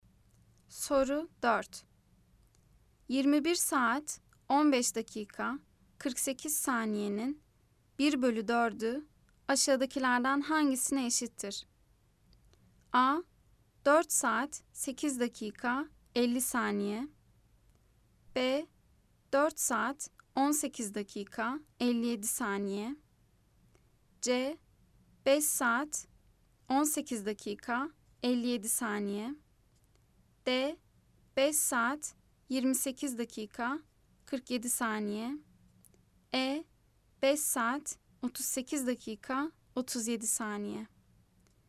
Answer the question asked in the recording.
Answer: Cevap Ceyhan 5 saat 18 dakika 57 saniye.